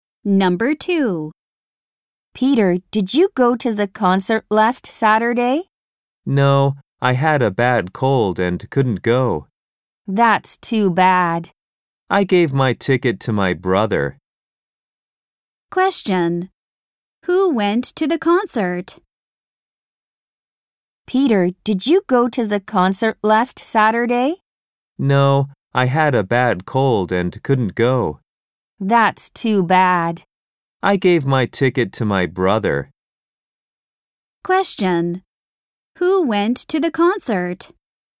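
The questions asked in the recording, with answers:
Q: Who went to the concert?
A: Peter's brother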